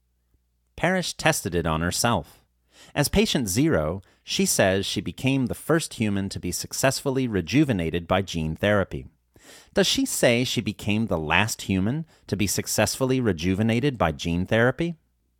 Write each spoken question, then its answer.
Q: Does she say she became the last human to be successfully rejuvenated by gene therapy?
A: No, she does not say she became the last human to be successfully rejuvenated by gene therapy.